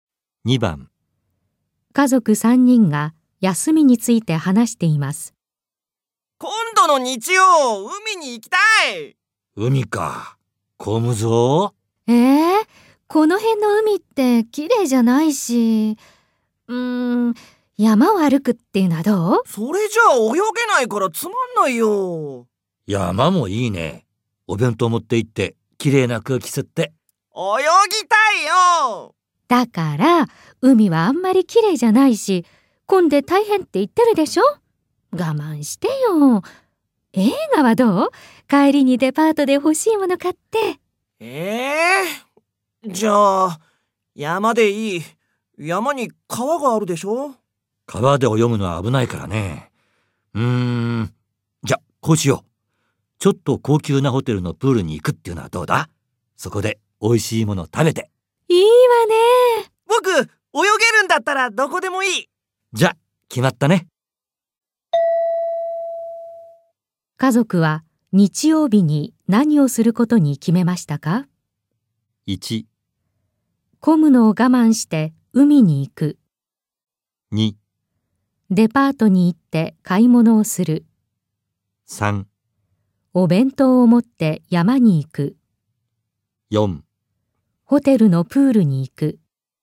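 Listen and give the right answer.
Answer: 4: ホテルのプールに行く。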